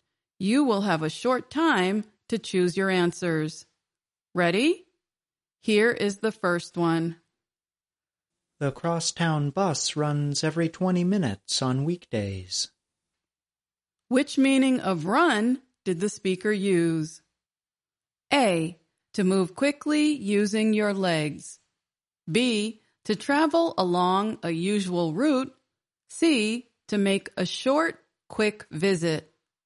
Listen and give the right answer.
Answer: The answer is B, to travel along a usual route.